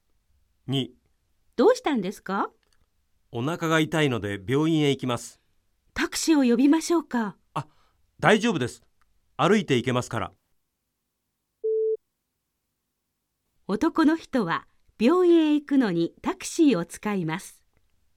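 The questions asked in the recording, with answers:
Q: 男の人は病院へ行くのにタクシーを使います。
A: ×(歩いて行く)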